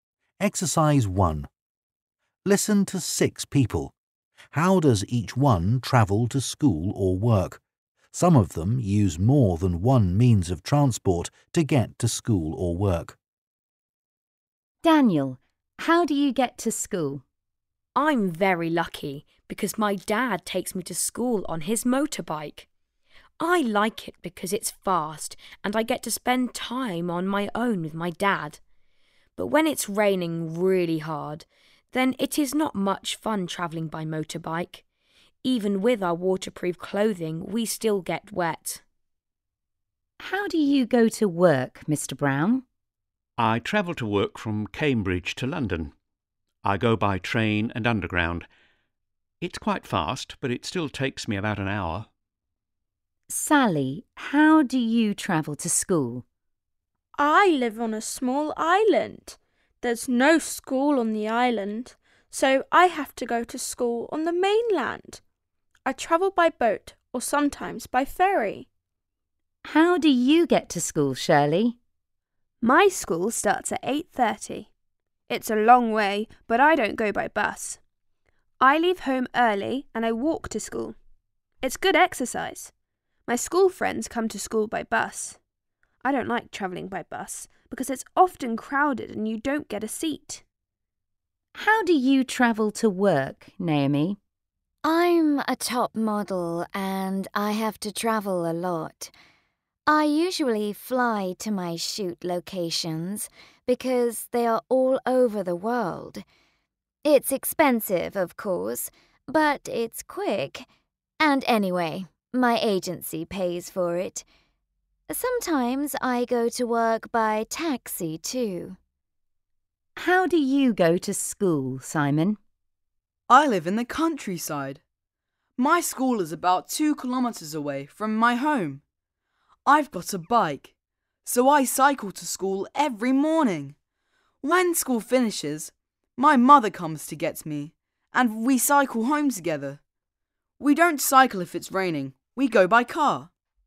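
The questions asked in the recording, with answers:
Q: Daniel, how do you get to school?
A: By motorbike, with his dad

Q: How do you go to work, Mr.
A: By train and underground

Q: Sally, how do you travel to school?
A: By boat or sometimes by ferry

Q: How do you get to school, Shirley?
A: She walks

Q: How do you travel to work, Naomi?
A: She usually flies, sometimes by taxi

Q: How do you go to school, Simon?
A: By bike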